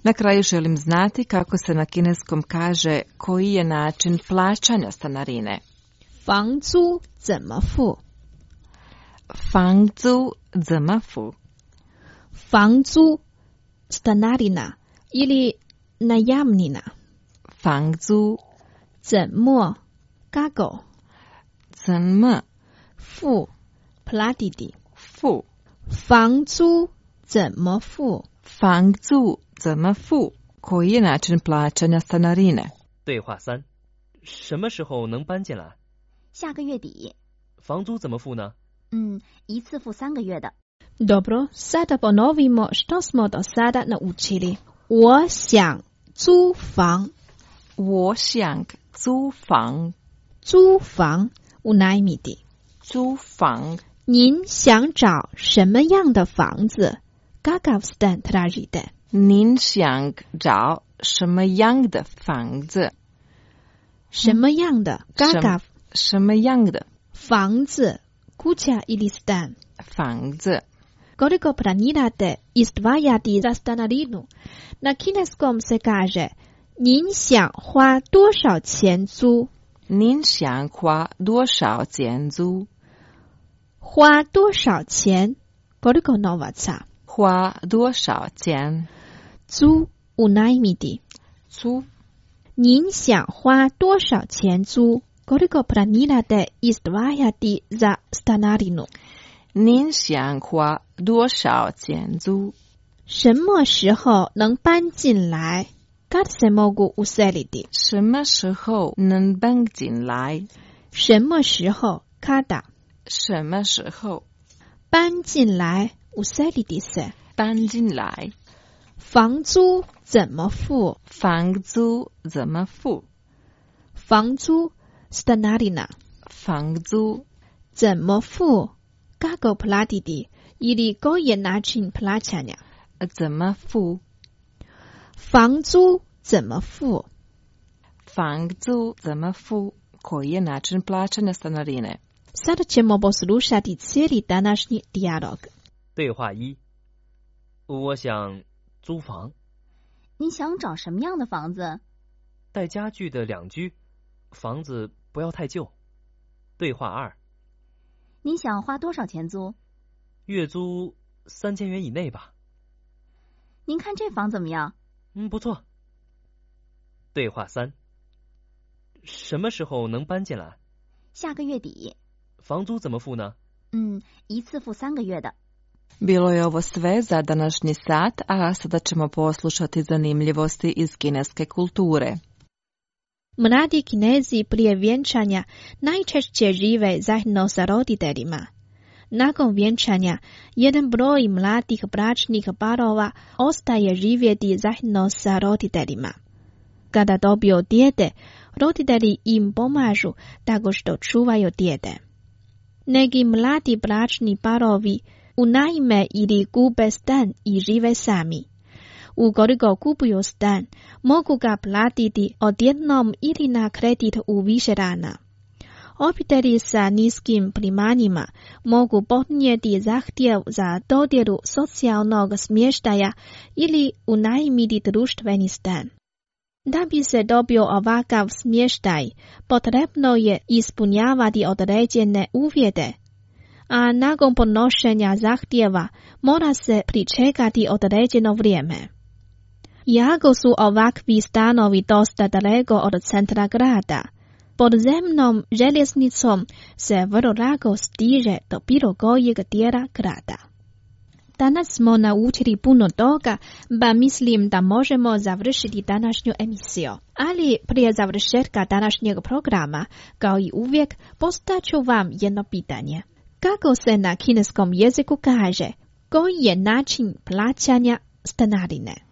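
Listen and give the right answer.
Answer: 房租怎么付? (Fangzu zenme fu?)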